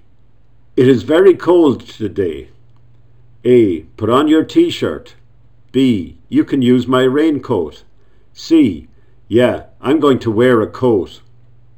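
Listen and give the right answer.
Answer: C: Yeah, I'm going to wear a coat.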